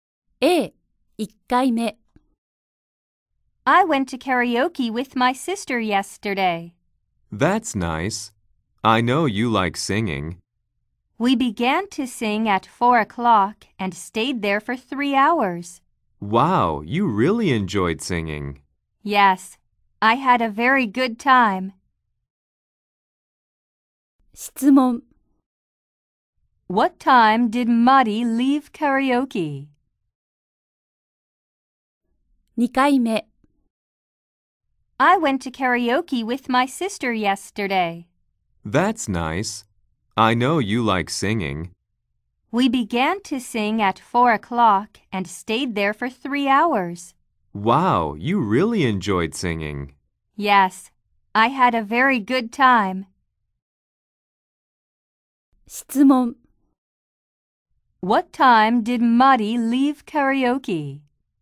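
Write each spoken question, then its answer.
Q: What time did Mari leave karaoke?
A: At 7 o'clock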